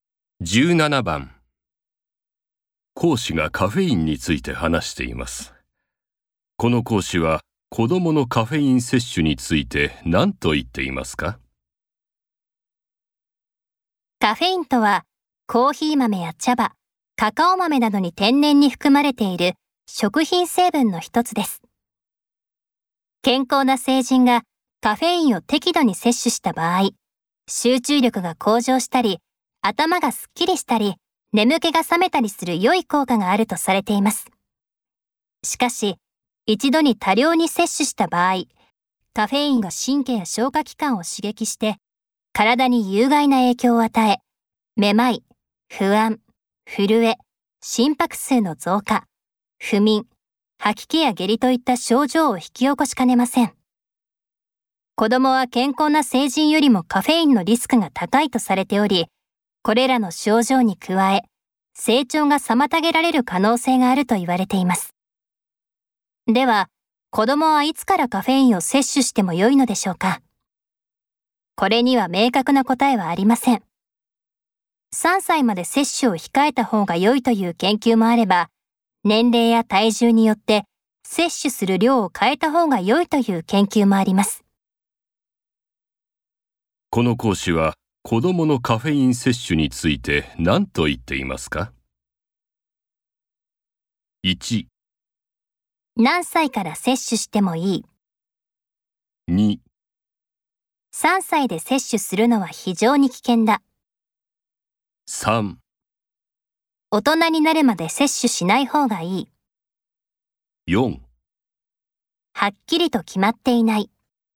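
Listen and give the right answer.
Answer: 4: はっきりと決まっていない。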